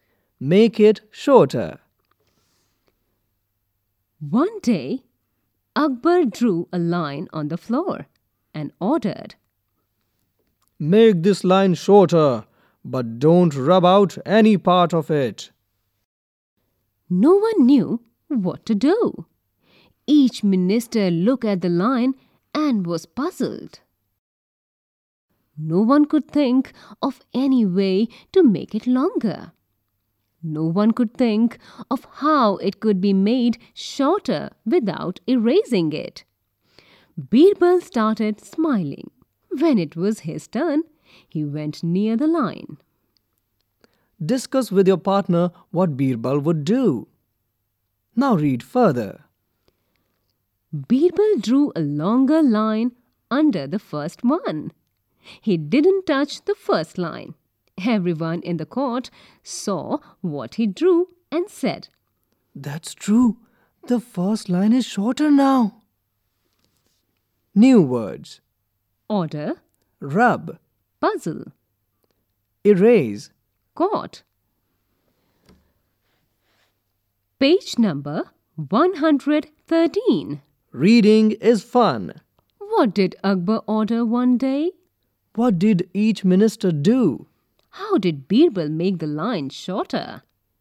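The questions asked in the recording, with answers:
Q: What did Akbar order one day?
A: To make the line shorter without rubbing out any part of it

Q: What did each minister do?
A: Looked at the line and was puzzled

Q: How did Birbal make the line shorter?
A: He drew a longer line under the first one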